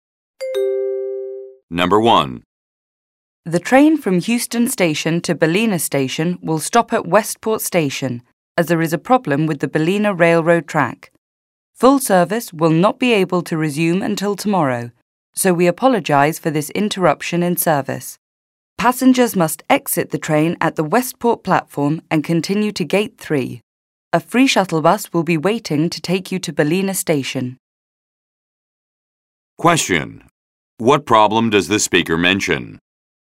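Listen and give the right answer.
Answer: A problem with the Ballina railroad track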